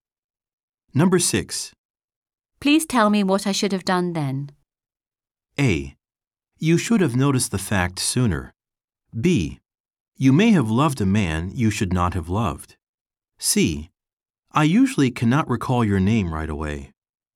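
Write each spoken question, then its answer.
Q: Please tell me what I should have done then.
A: A: You should have noticed the fact sooner.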